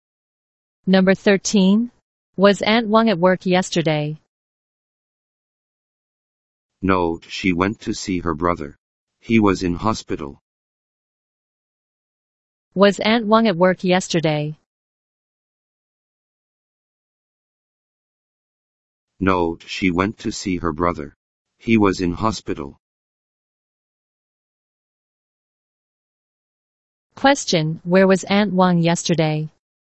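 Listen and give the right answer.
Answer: In hospital, visiting her brother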